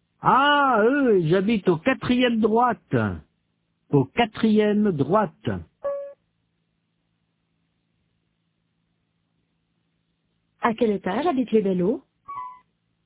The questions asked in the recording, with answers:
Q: À quel étage habitent les Bello ?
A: Au quatrième.